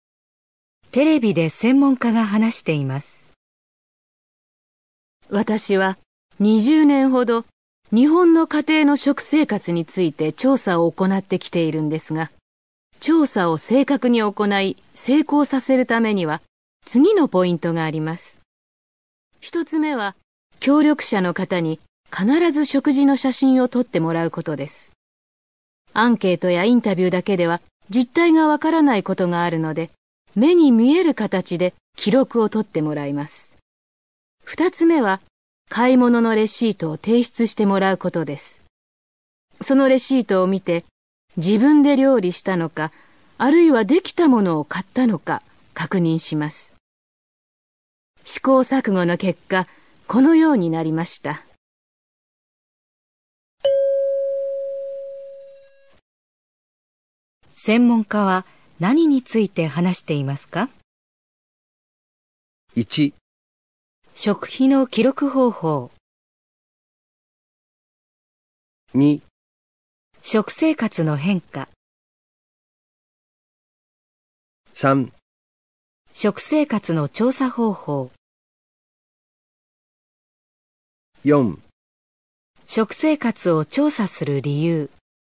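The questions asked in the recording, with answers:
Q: 専門家は何について話していますか?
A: 3: 食生活の調査方法。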